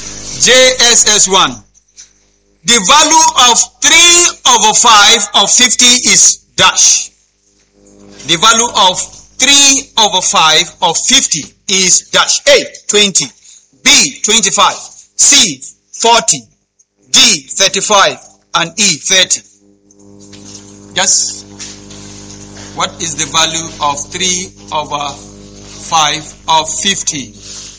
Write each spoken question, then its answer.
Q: The value of 3 over 5 of 50 is dash.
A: Letter E. A round of applause.